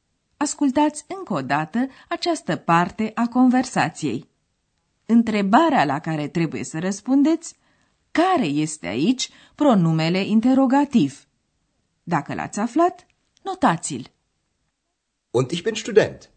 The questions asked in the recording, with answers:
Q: Întrebarea la care trebuie să răspundeți care este aici pronumele interrogativ.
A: Căutam apoi pronumele interogativ was.